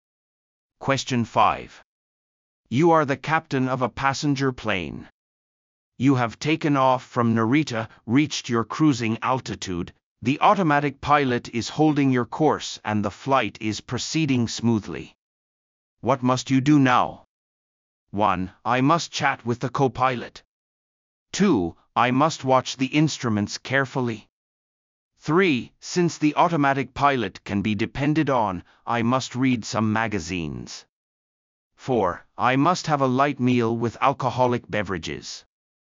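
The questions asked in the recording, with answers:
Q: What must you do now?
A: 2: I must watch the instruments carefully.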